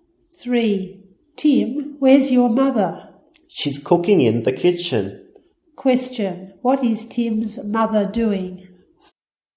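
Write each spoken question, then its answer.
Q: What is Tim's mother doing?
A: Cooking in the kitchen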